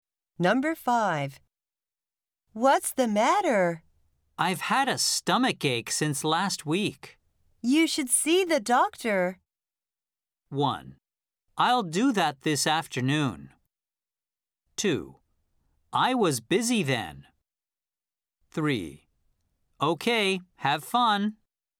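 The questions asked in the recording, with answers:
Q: You should see the doctor.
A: 1: I'll do that this afternoon.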